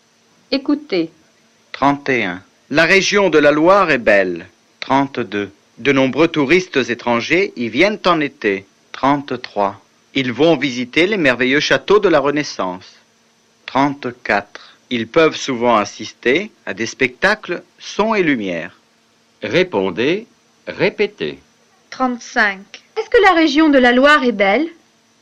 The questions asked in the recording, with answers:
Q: Est-ce que la région de la Loire est belle?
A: Oui, la région de la Loire est belle.